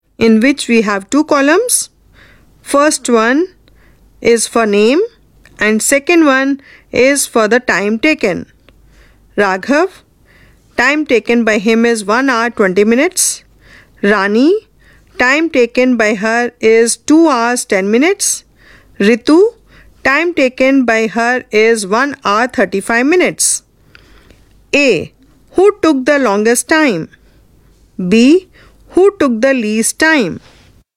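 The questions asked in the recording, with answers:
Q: Who took the longest time?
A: Rani

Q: Who took the least time?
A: Raghav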